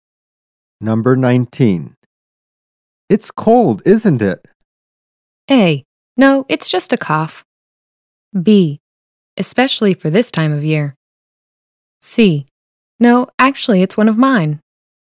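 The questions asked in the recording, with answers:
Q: It's cold, isn't it?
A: B: Especially for this time of year.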